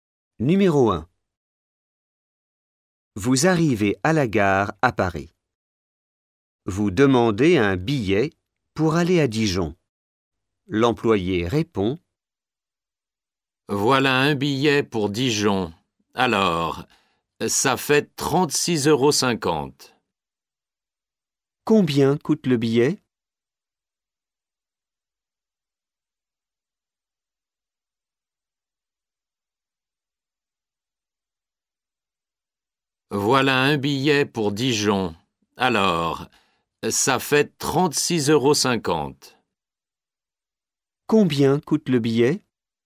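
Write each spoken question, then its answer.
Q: Combien coûte le billet ?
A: 36,50 €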